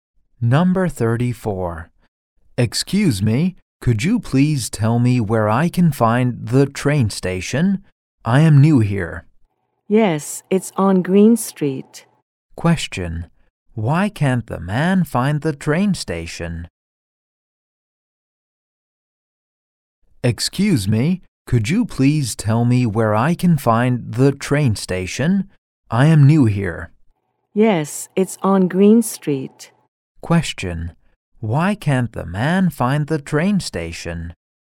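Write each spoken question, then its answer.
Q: Why can't the man find the train station?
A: He is new here.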